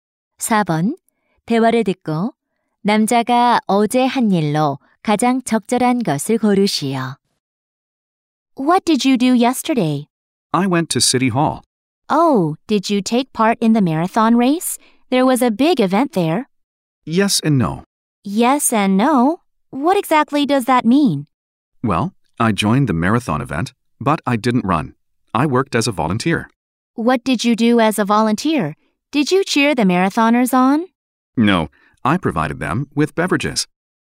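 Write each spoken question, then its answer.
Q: 대화를 듣고 남자가 어제 한 일로 가장 적절한 것을 고르시오.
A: 마라톤 자원봉사로 음료 제공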